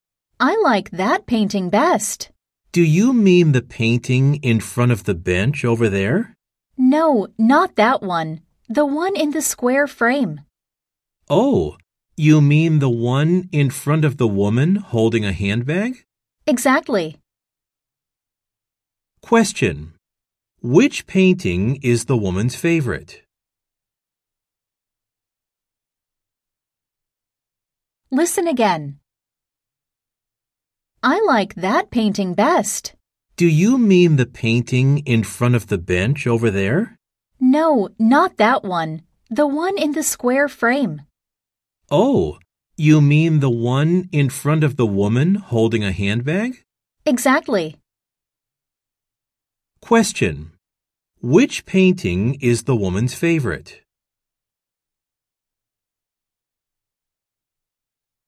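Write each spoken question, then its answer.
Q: Which painting is the woman's favorite?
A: The one in the square frame, in front of the woman holding a handbag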